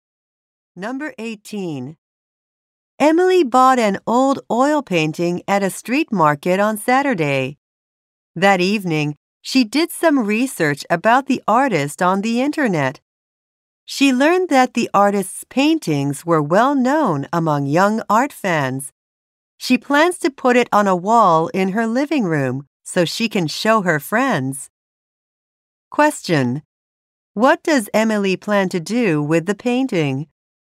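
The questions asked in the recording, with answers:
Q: What does Emily plan to do with the painting?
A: Hang it in her living room to show her friends.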